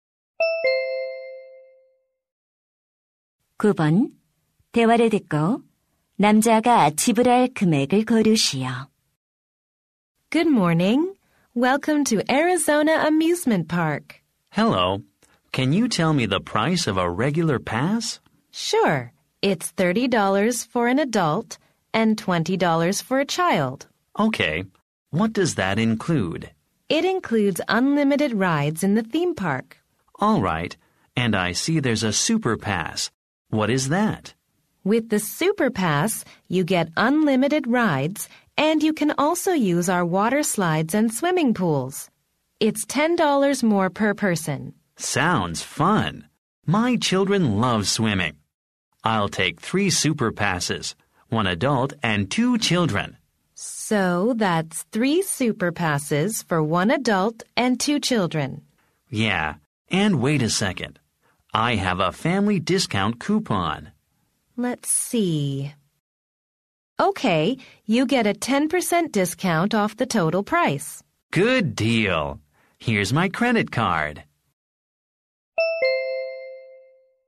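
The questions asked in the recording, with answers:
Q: 대화를 듣고 남자가 지불할 금액을 고르시오.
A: 90달러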